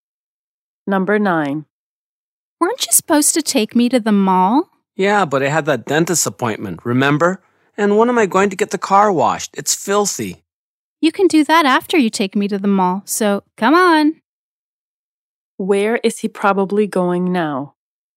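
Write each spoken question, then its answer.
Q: Where is he probably going now?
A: To the mall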